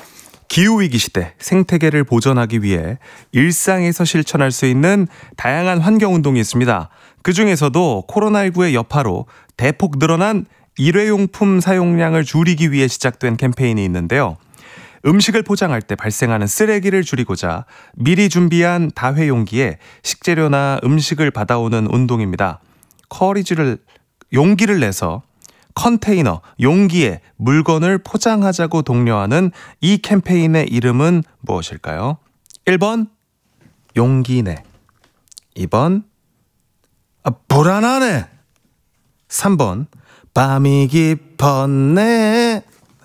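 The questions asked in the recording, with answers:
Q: 용기를 내서 컨테이너, 용기에 물건을 포장하자고 독려하는 이 캠페인의 이름은 무엇일까요?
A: 1번: 용기 내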